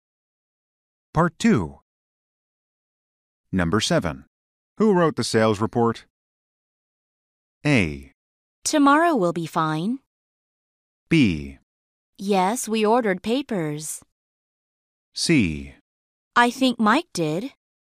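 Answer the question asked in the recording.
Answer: C: I think Mike did.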